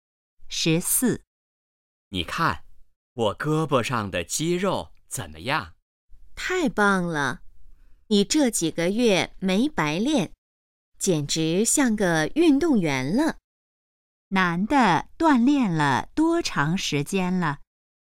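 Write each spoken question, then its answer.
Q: 男的锻炼了多长时间了?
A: 几个月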